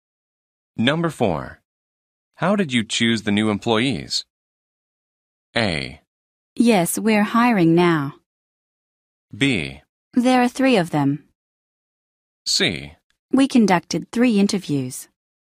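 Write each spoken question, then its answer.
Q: How did you choose the new employees?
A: C: We conducted 3 interviews.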